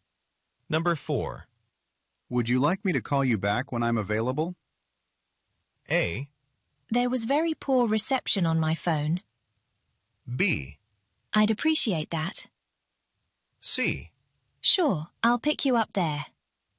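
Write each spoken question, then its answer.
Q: Would you like me to call you back when I'm available?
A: B: I'd appreciate that.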